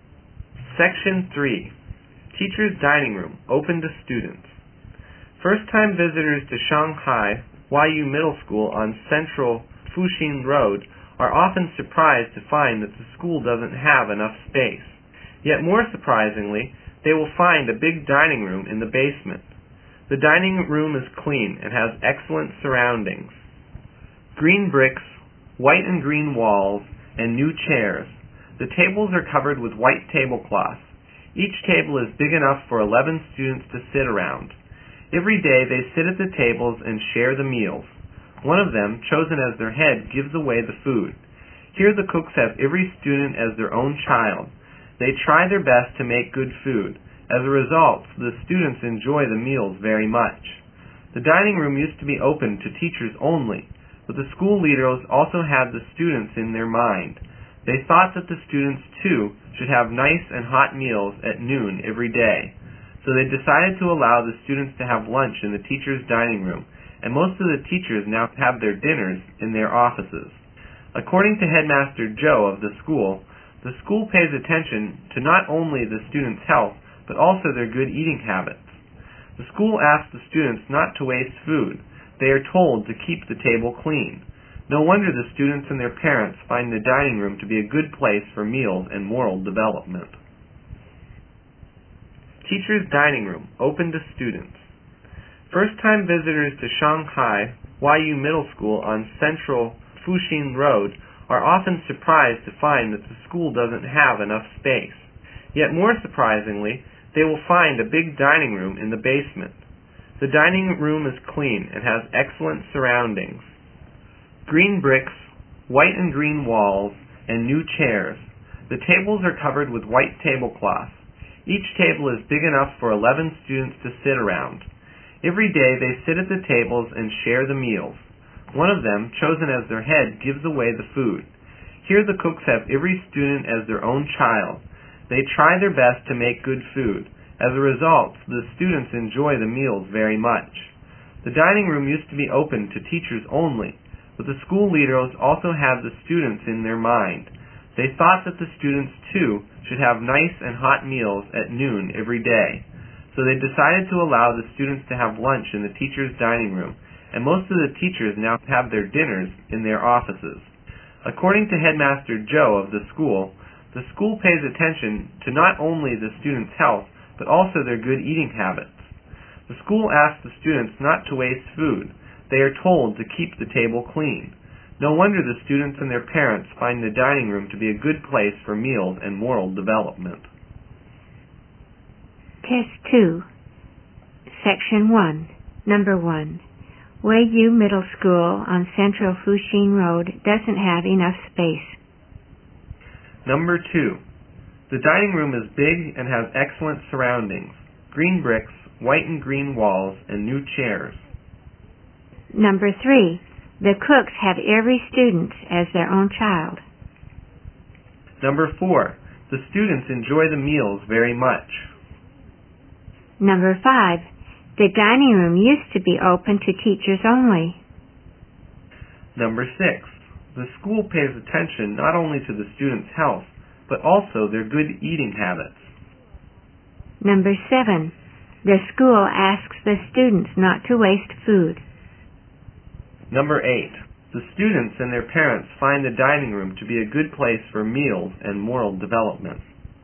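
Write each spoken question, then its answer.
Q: Weiyu Middle School on Central Fuxing Road doesn't have enough space.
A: True

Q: The cooks have every student as their own child.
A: True

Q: The students enjoy the meals very much.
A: True

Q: The dining room used to be open to teachers only.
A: True

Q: The school pays attention not only to the students' health, but also their good eating habits.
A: True

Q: The school asks the students not to waste food.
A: True

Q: The students and their parents find the dining room to be a good place for meals and moral development.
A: True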